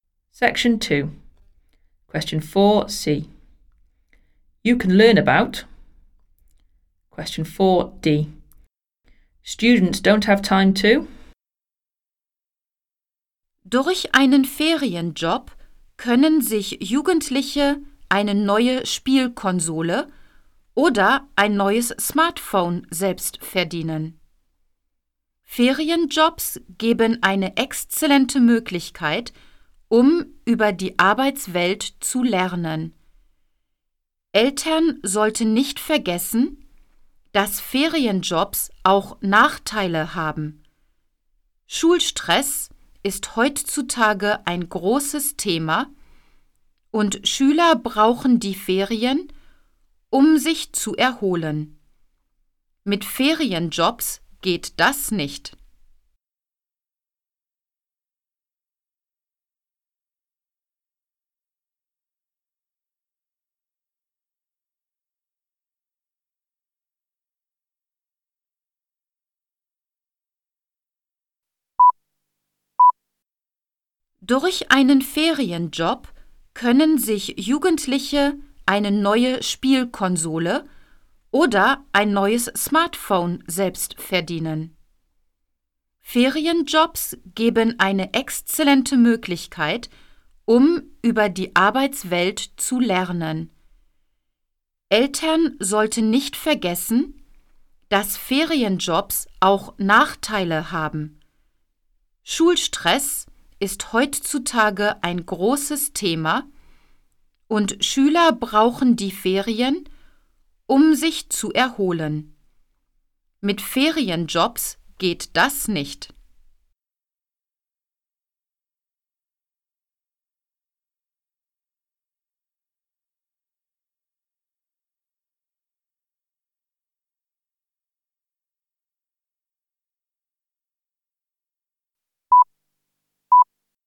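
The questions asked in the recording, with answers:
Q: You can learn about.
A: the world of work

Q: Students don't have time to.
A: recover/relax from school stress in the holidays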